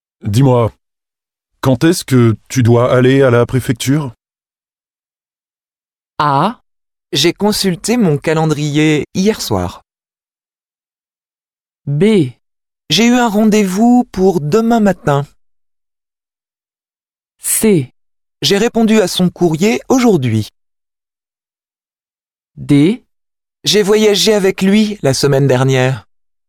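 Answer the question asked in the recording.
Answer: B: J'ai eu un rendez-vous pour demain matin.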